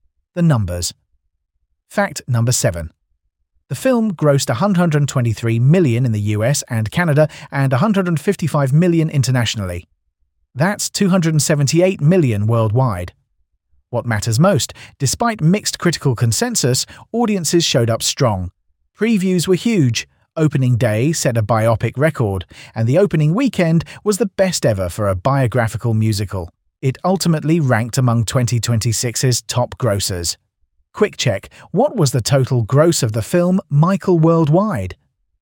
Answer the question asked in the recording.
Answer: Correct answer, 278 million